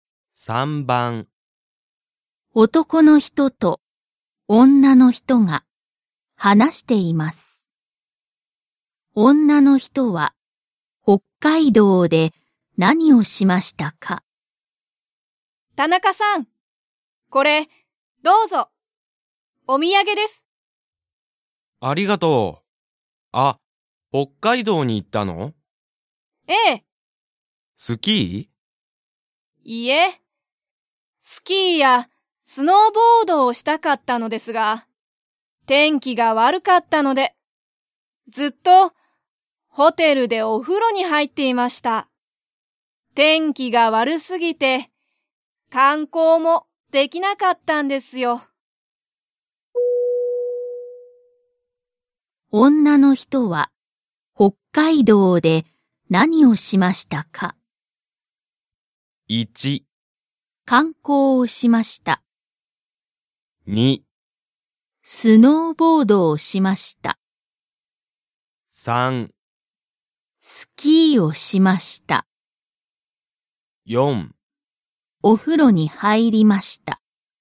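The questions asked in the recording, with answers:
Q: 女の人は北海道で何をしましたか?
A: 4: お風呂に入りました。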